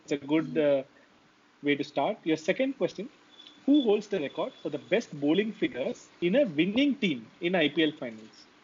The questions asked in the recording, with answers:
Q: who holds the record for the best bowling figures in a winning team in IPL finals?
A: It is actually Ravichandran Ashwin in 2011. He took 3 for 16.